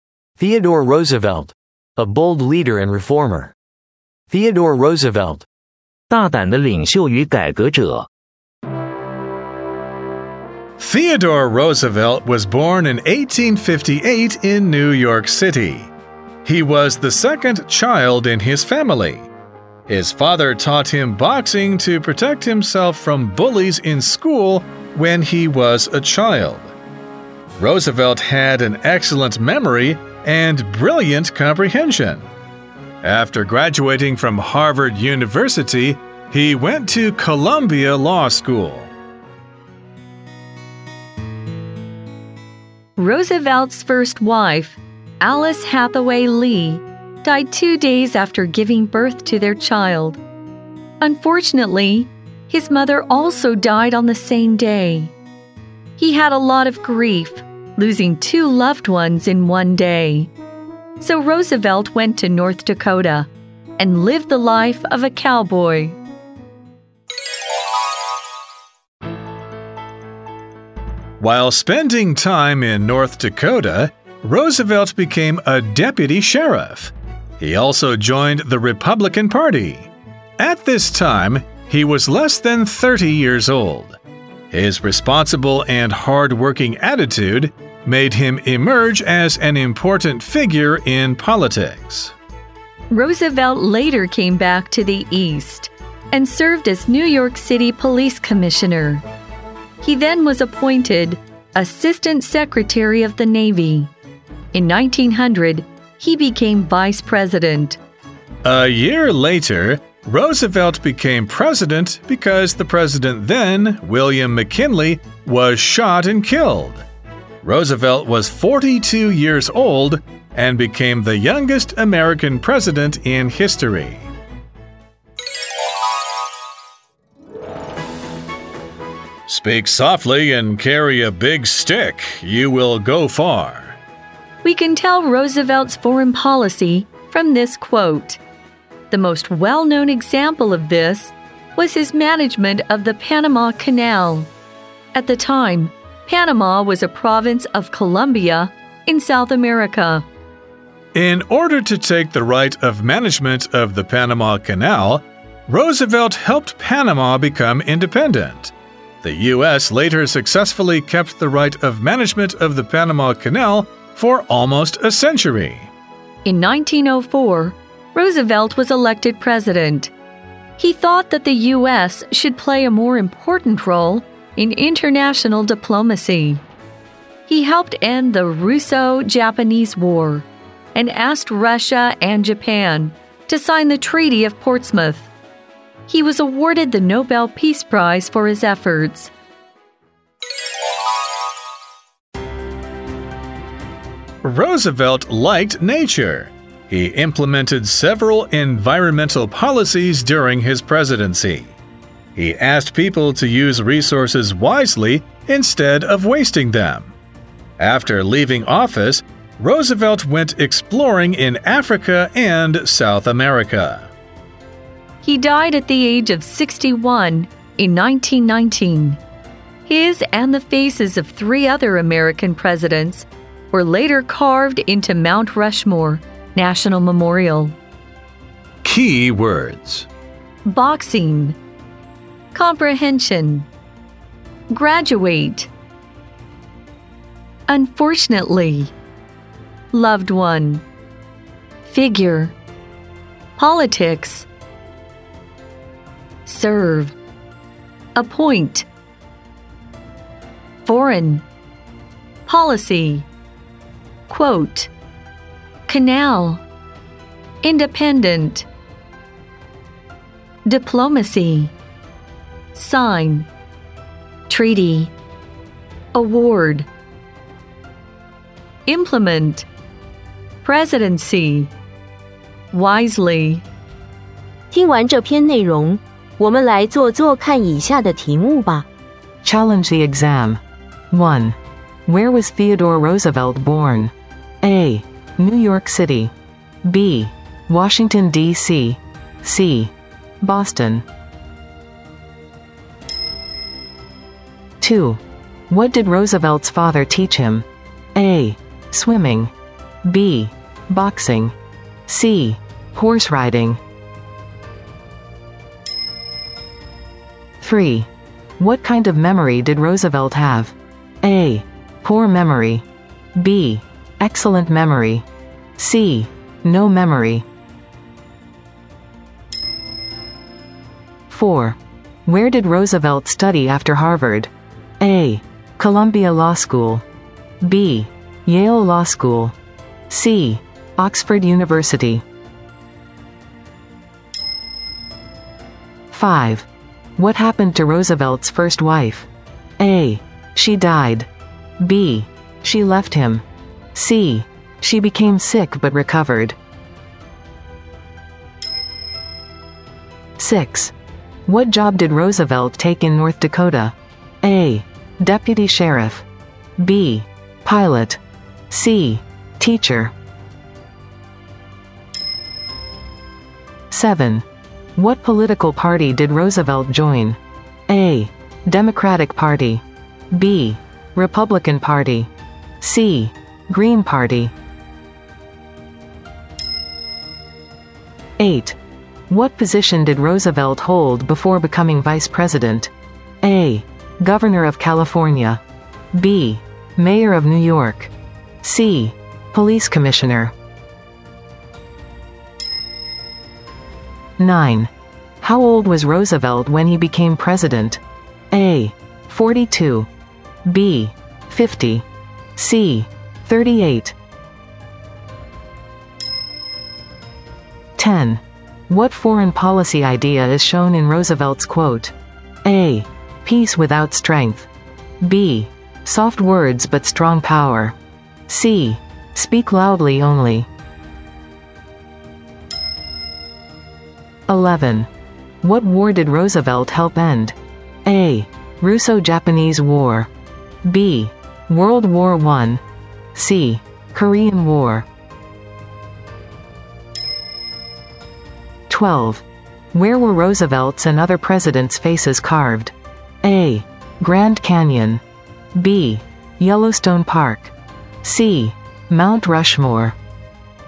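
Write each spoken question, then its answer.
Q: Where was Theodore Roosevelt born?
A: A: New York City

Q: What did Roosevelt's father teach him?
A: B: Boxing

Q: What kind of memory did Roosevelt have?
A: B: Excellent memory

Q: Where did Roosevelt study after Harvard?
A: A: Columbia Law School

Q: What happened to Roosevelt's first wife?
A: A: She died

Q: What job did Roosevelt take in North Dakota?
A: A: Deputy Sheriff

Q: What political party did Roosevelt join?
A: B: Republican Party

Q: What position did Roosevelt hold before becoming Vice President?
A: C: Police Commissioner

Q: How old was Roosevelt when he became president?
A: A: 42

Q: What foreign policy idea is shown in Roosevelt's quote?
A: B: Soft words but strong power

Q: What war did Roosevelt help end?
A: A: Russo-Japanese War

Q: Where were Roosevelt's and other presidents' faces carved?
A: C: Mount Rushmore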